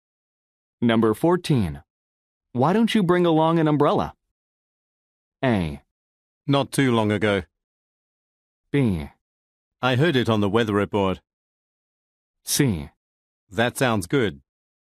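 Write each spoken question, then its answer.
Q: Why don't you bring along an umbrella?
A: C: That sounds good.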